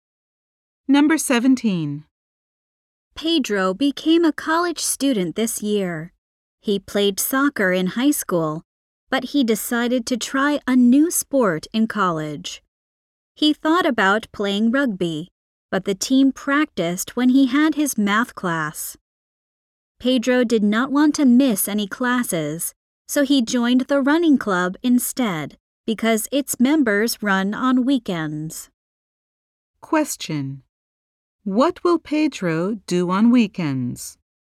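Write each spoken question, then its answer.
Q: what will Pedro do on weekends?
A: Run with the running club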